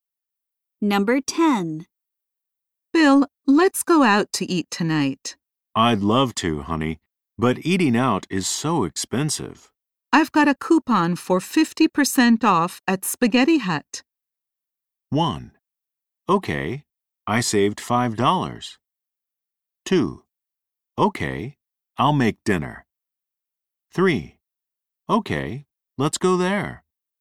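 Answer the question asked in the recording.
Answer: 3: Okay, let's go there.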